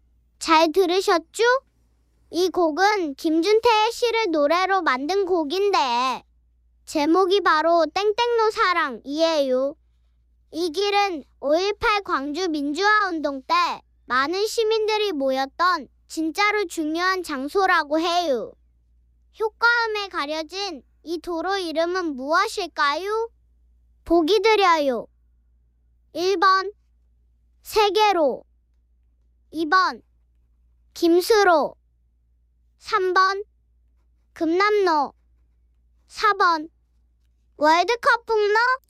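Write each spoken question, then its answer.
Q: 효과음에 가려진 이 도로 이름은 무엇일까요?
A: 3번: 금남로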